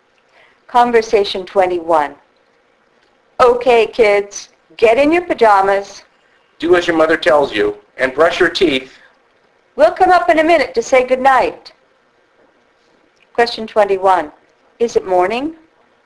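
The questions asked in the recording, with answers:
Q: Is it morning?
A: No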